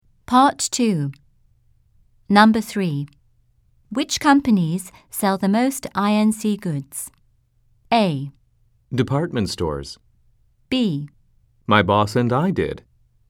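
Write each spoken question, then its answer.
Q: Which companies sell the most INC goods?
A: A: Department stores.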